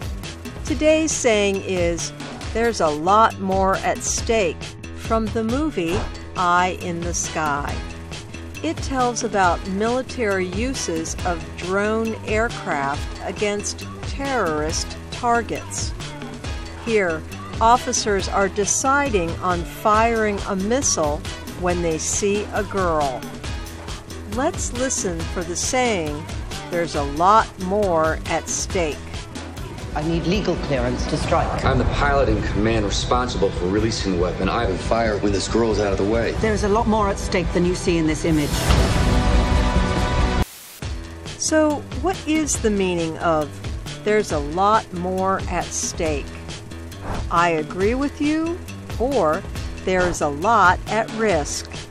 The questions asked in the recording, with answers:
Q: So, what is the meaning of there's a lot more at stake?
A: There is a lot more at stake means there is a lot at risk.